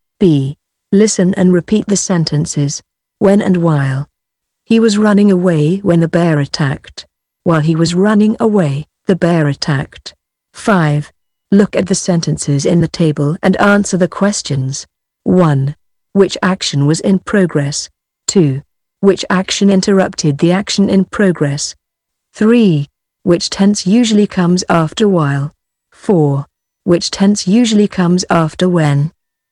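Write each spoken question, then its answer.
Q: Which action was in progress?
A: He was running away

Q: Which action interrupted the action in progress?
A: The bear attacked

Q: Which tense usually comes after while?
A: Past continuous

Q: Which tense usually comes after when?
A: Past simple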